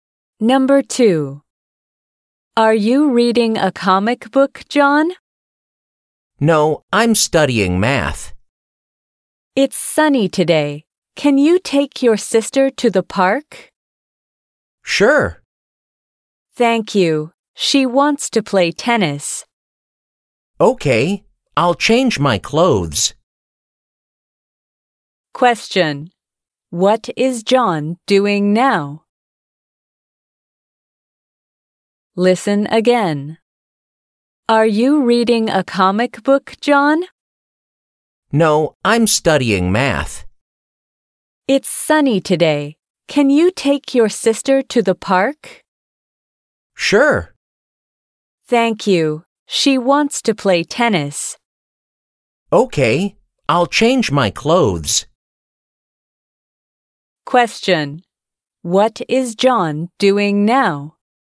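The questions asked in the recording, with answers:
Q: What is John doing now?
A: Studying math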